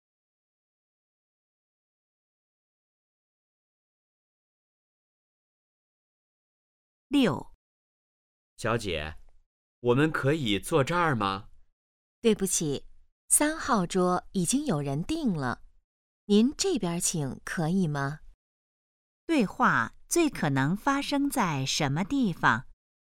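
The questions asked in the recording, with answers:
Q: 对话最可能发生在什么地方?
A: 饭店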